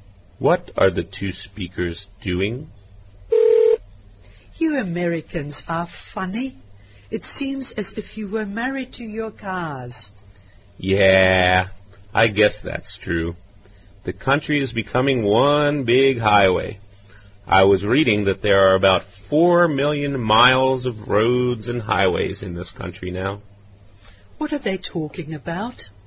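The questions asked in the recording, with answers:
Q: What are they talking about?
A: Americans and their cars and roads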